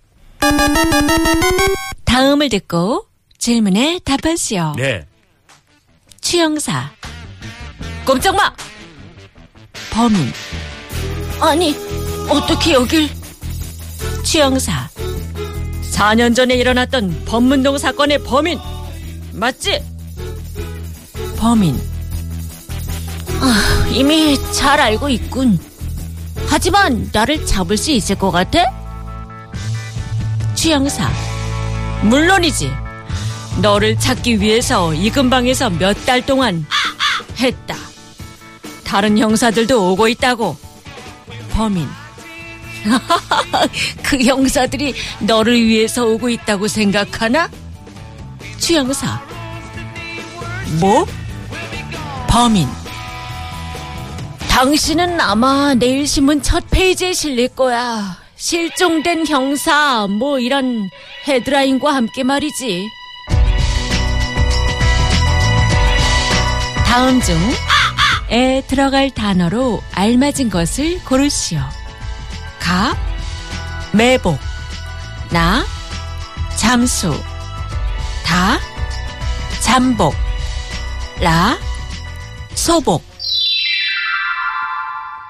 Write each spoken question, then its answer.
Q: 다음 중에 들어갈 단어로 알맞은 것을 고르시오.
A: And in fact, the answer we were looking for was da, chambok, stakeout.